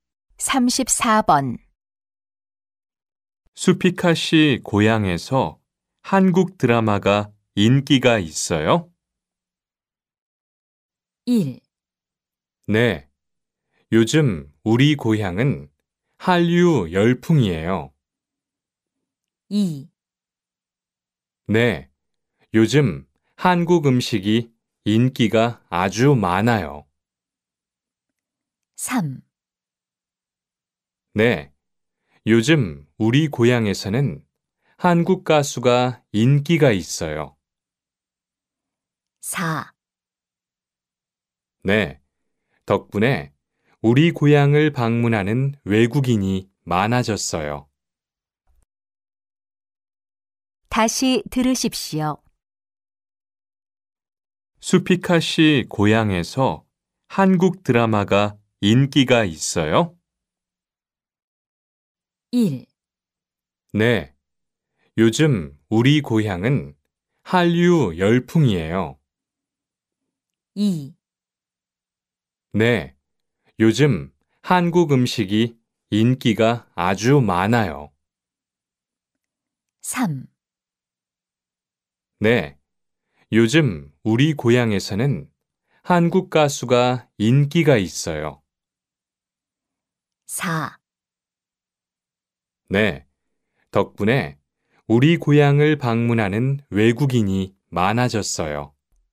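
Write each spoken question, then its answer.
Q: 수피카 씨 고향에서 한국 드라마가 인기가 있어요?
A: 1: 네. 요즘 우리 고향은 한류 열풍이에요.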